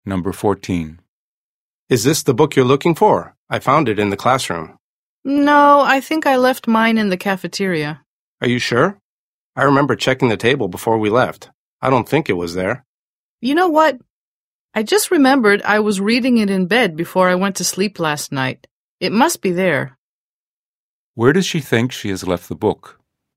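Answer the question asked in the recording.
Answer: In her bed (at home in her bedroom)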